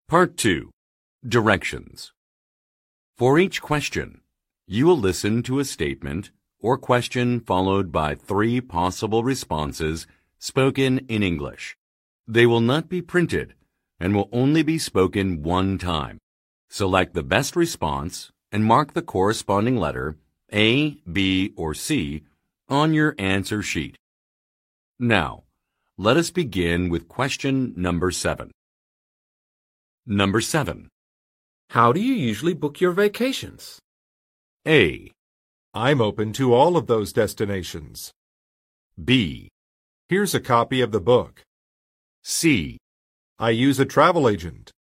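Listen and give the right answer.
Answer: I use a travel agent.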